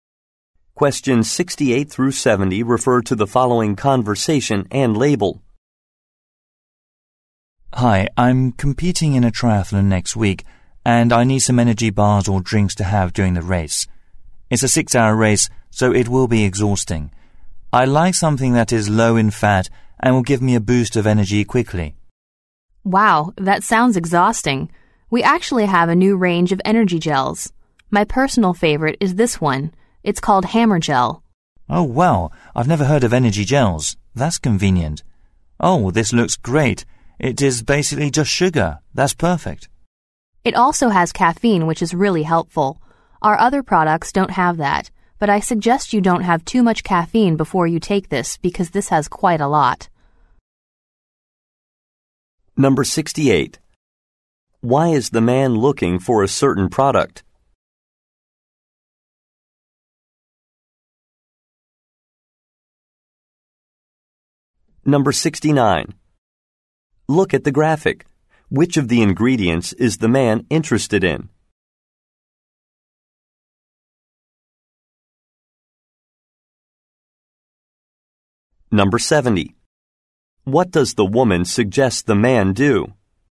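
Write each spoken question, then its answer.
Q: Why is the man looking for a certain product?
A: He is competing in a triathlon

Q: What does the woman suggest the man do?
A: Not have too much caffeine beforehand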